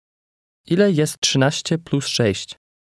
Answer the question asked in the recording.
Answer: 19.